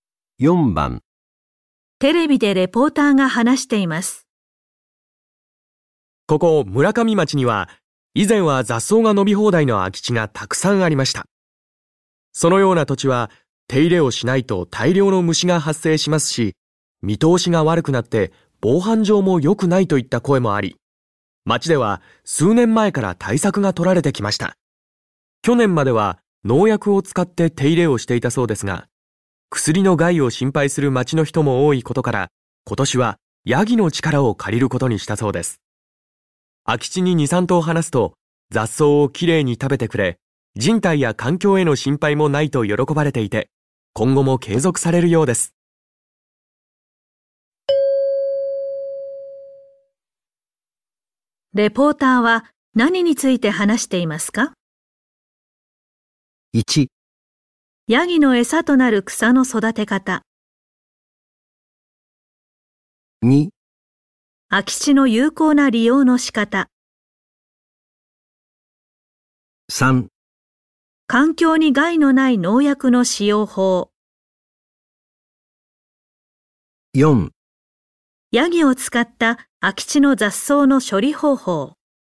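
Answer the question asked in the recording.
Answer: 4: ヤギを使った空き地の雑草の処理方法。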